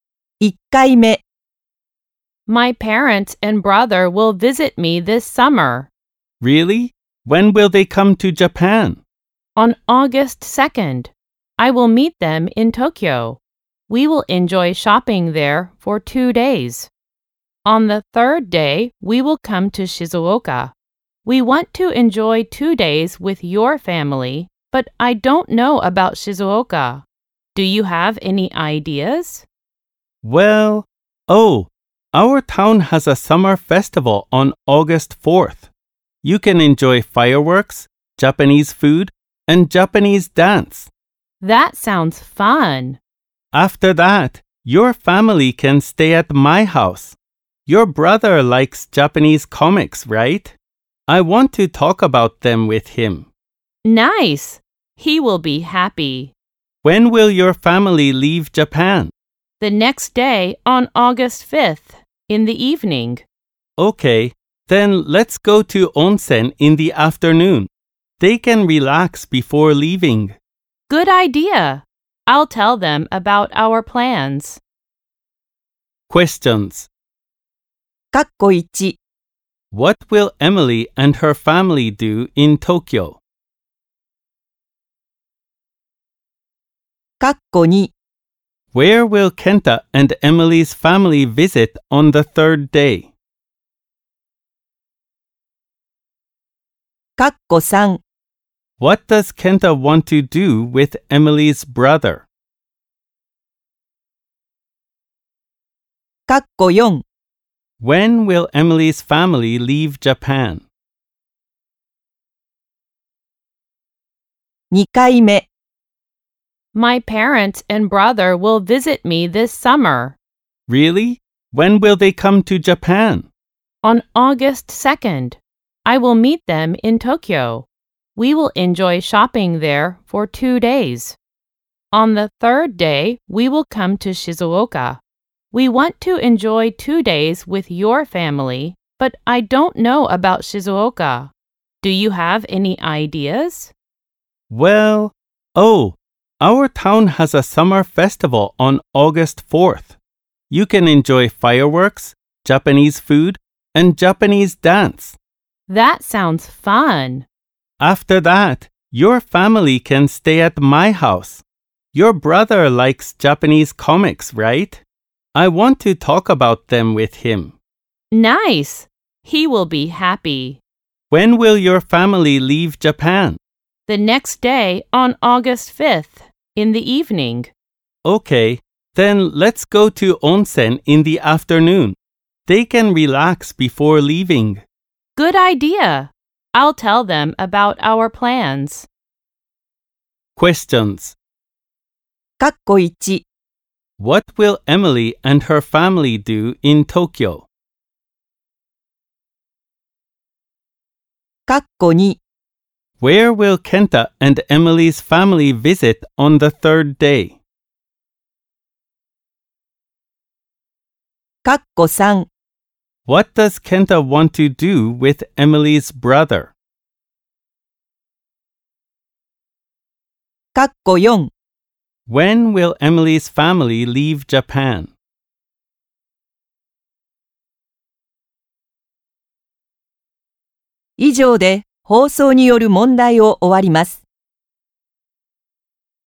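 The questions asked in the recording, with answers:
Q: What will Emily and her family do in Tokyo?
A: They will enjoy shopping for 2 days

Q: Where will Kenta and Emily's family visit on the third day?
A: Shizuoka (the summer festival in Kenta's town)

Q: What does Kenta want to do with Emily's brother?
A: Talk about Japanese comics with him

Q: When will Emily's family leave Japan?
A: On the evening of August 5th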